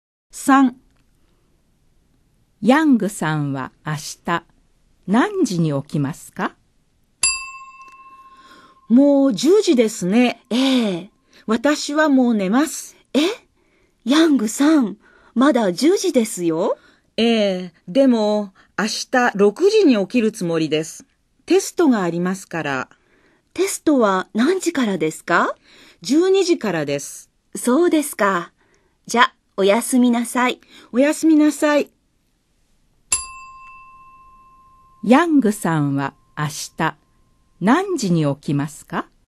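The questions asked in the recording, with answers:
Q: ヤングさんは明日何時に起きますか?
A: 6時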